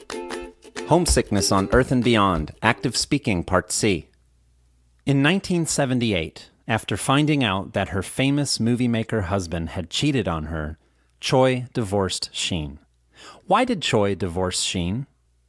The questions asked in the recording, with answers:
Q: Why did Choi divorce Sheen?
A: Choi divorced Sheen because he cheated on her.